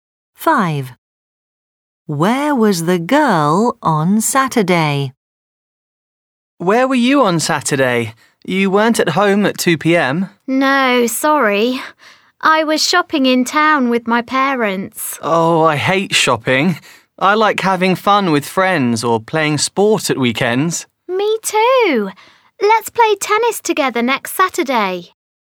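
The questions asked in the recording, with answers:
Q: Where was the girl on Saturday?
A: Shopping in town with her parents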